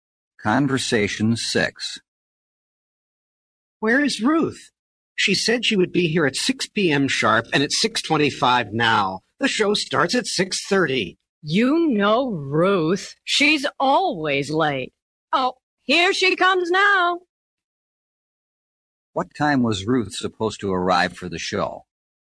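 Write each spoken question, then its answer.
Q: What time was Ruth supposed to arrive for the show?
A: At 6 p.m.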